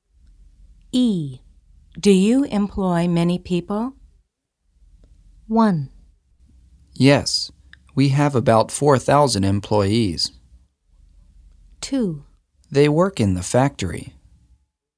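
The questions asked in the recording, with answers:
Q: Do you employ many people?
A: 1: Yes, we have about 4,000 employees.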